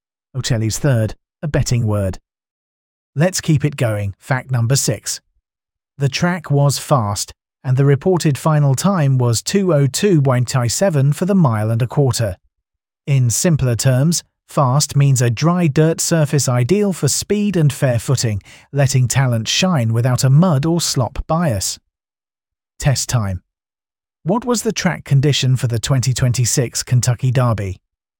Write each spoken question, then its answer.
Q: What was the track condition for the 2026 Kentucky Derby?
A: Correct answer, fast.